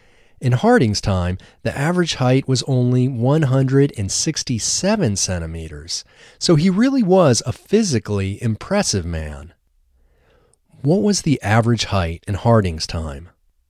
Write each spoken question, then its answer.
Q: What was the average height in Harding's time?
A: In Harding's time, the average height was only 167 centimeters.